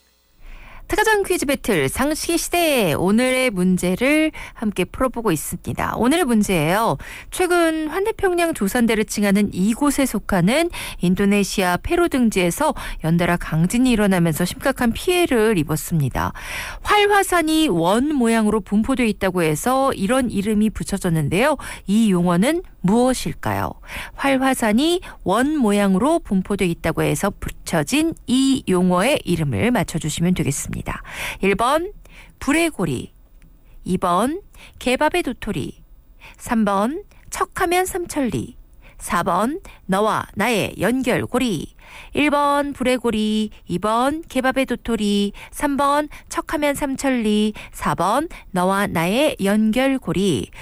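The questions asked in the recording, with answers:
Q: 이 용어는 무엇일까요?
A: 1번: 불의 고리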